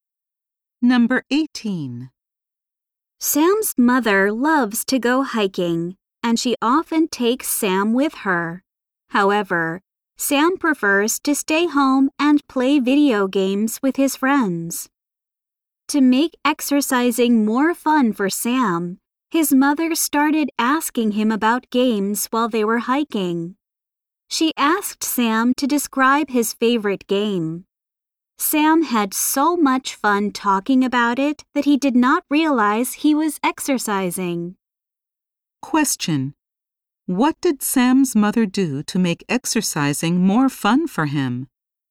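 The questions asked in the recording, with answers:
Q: What did Sam's mother do to make exercising more fun for him?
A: She asked him about his video games while hiking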